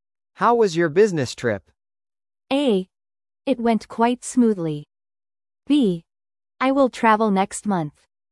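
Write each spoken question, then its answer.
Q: How was your business trip?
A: A: It went quite smoothly.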